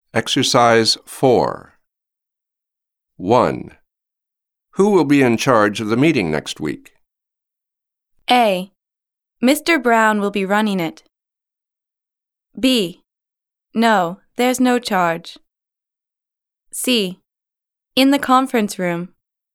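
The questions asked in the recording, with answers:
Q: Who will be in charge of the meeting next week?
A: A: Mr. Brown will be running it.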